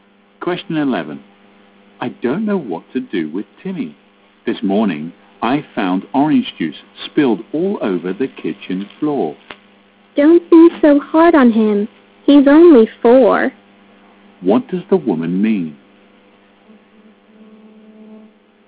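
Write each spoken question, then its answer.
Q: What does the woman mean?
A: The man shouldn't be so hard on Timmy because he's only four.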